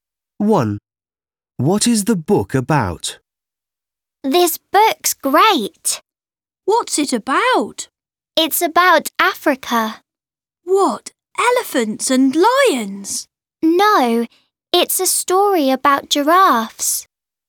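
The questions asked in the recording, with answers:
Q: What is the book about?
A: giraffes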